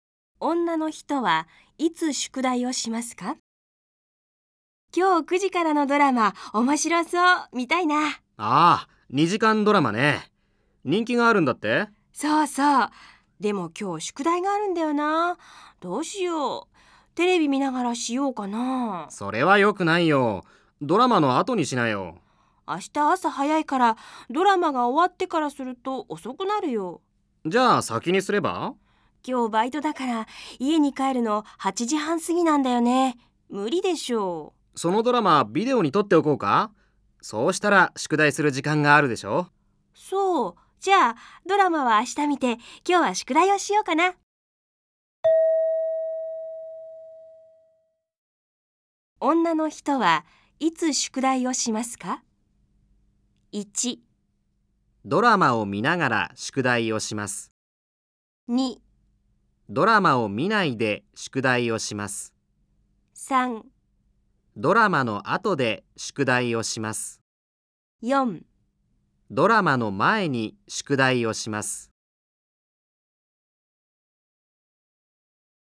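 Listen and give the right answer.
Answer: 2: ドラマを見ないで宿題をします。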